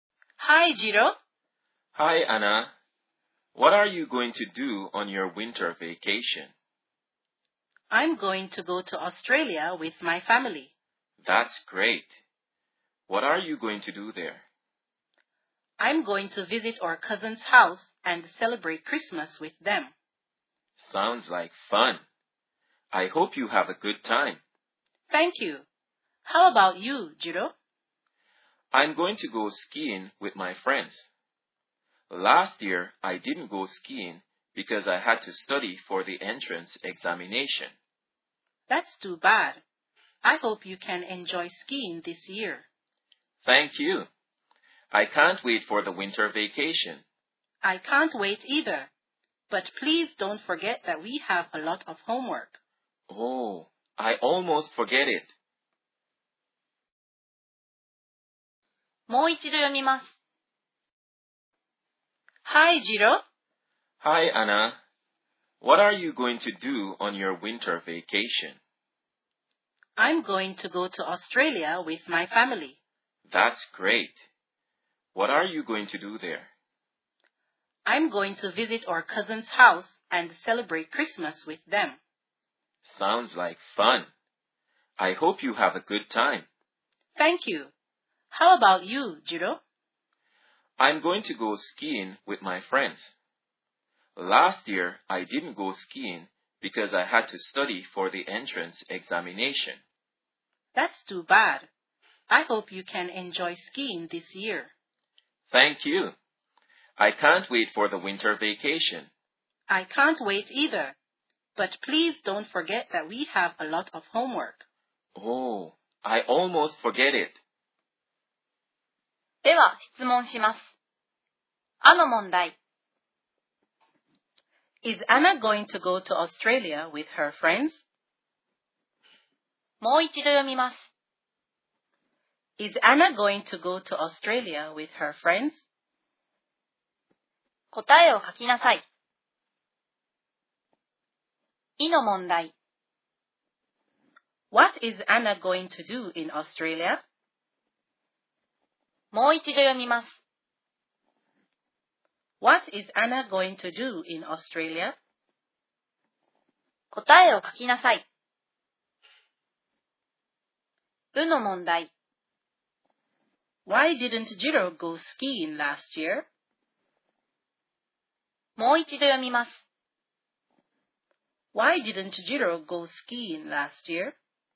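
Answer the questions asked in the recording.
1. No, she isn't. She is going with her family.
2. Visit her cousin's house and celebrate Christmas with them
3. Because he had to study for the entrance examination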